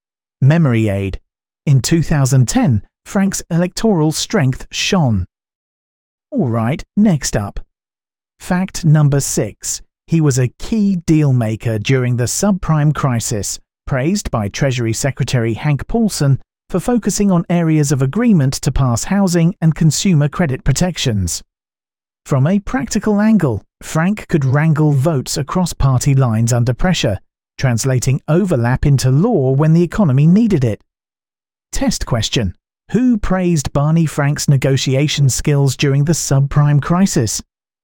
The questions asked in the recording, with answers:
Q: Who praised Barney Frank's negotiation skills during the subprime crisis?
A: Hank Paulson.